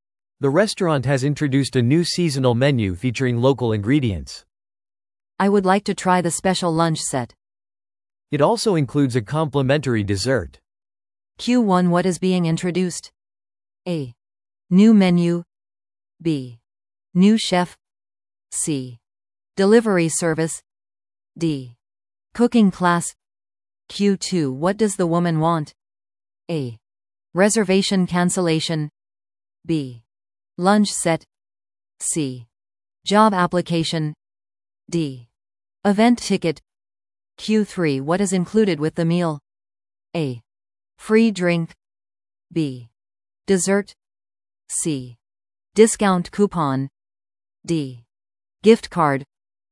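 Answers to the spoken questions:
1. A: New menu.
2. B: Lunch set.
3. B: Dessert.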